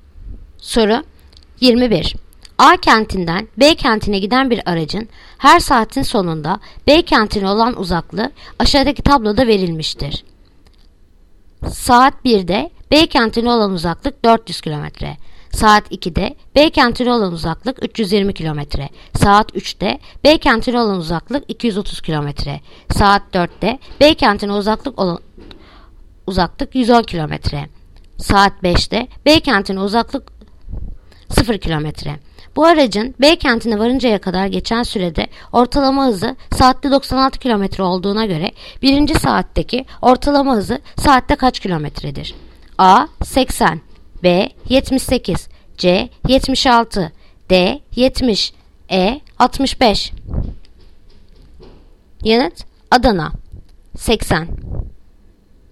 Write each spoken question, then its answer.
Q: Bu aracın B kentine varıncaya kadar geçen sürede ortalama hızı saatte 96 km olduğuna göre birinci saatteki ortalama hızı saatte kaç kilometredir?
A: Yanıt Adana 80